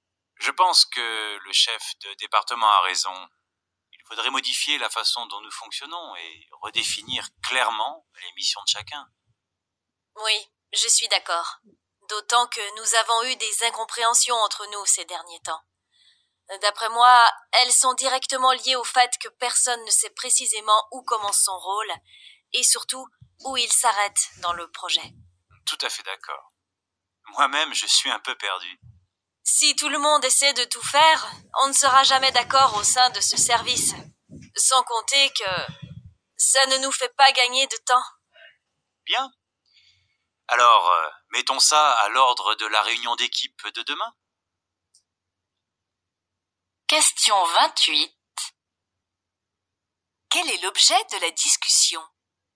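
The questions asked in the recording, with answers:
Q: Quel est l'objet de la discussion?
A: La nécessité de réorganiser le fonctionnement du service et de redéfinir clairement le rôle de chacun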